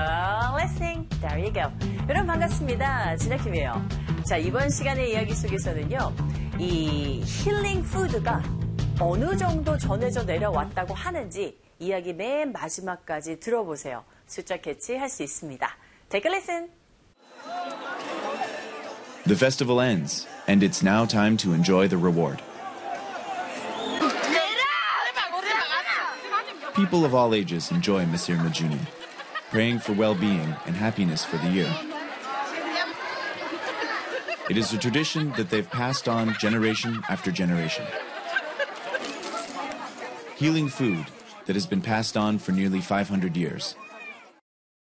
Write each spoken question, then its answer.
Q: 이 힐링 푸드가 어느 정도 전해져 내려왔다고 하는지 이야기 맨 마지막까지 들어보세요.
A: 거의 500년에 거쳐서 전해져 왔다고 합니다.